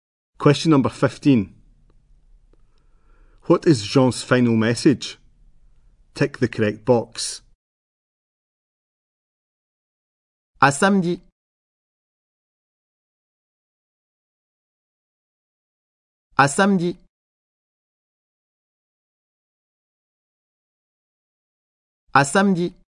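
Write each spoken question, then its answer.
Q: What is Jean's final message?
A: See you on Saturday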